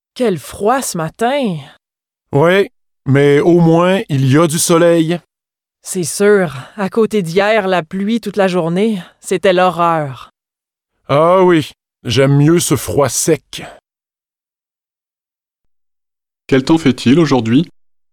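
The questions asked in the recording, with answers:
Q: Quel temps fait-il aujourd'hui?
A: Il fait froid et sec, avec du soleil.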